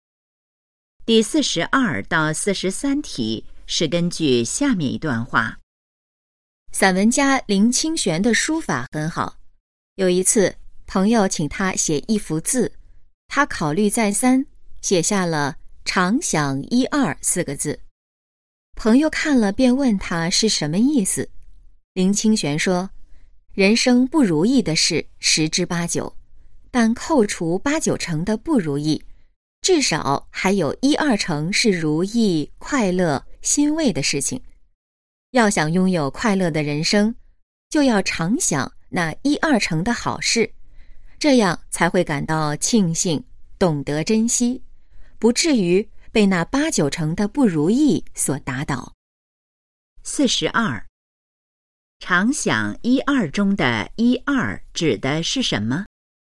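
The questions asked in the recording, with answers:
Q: 常想一二中的一二指的是什么?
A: 人生中一二成如意、快乐、欣慰的事情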